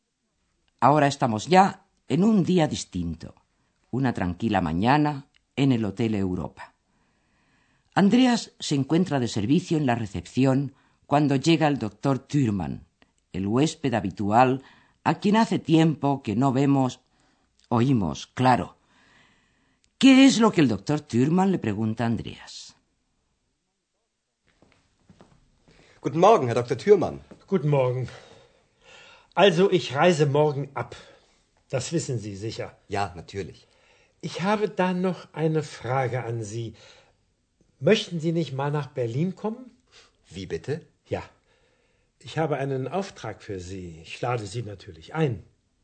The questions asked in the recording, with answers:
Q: ¿Qué es lo que el doctor Thürmann le pregunta a Andreas?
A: Efectivamente, el Dr. Thürmann parte al día siguiente y le pregunta a Andreas si no quisiera ir con él a Berlín.